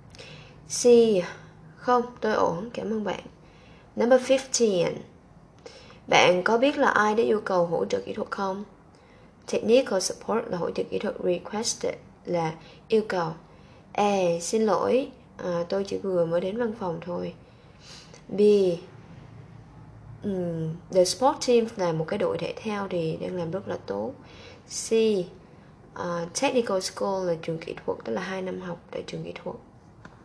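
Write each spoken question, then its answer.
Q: Bạn có biết là ai đã yêu cầu hỗ trợ kỹ thuật không?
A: A: Xin lỗi, tôi chỉ vừa mới đến văn phòng thôi.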